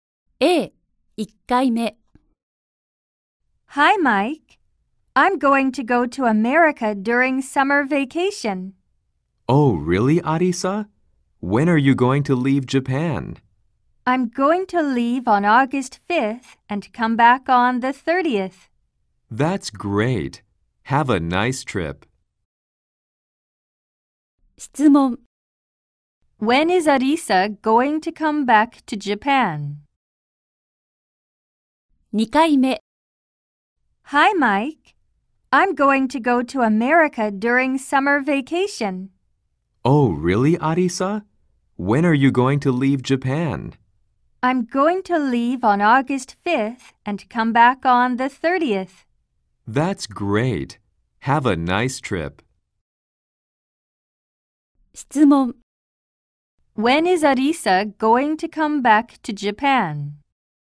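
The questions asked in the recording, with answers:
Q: When is Arisa going to come back to Japan?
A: On August 30th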